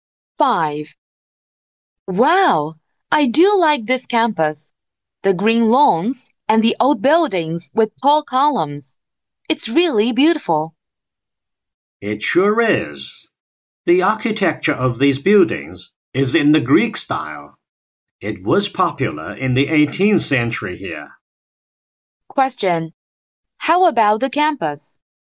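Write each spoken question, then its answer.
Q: How about the campus?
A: It is beautiful, with Greek-style buildings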